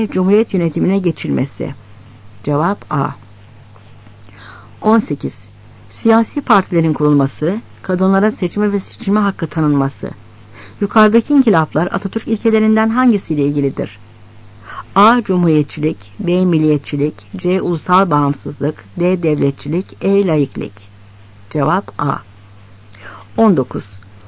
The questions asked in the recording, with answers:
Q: Yukarıdaki inkılaplar Atatürk ilkelerinden hangisiyle ilgilidir?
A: Cevap A.